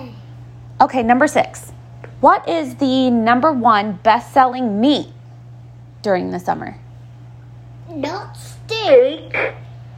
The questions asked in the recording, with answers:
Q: What is the number one best-selling meat during the summer?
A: It is hot dogs.